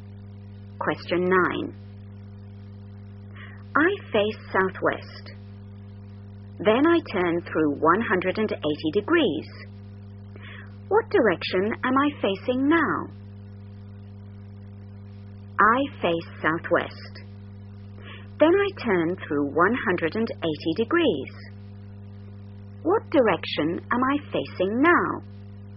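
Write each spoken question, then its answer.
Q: What direction am I facing now?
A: Northeast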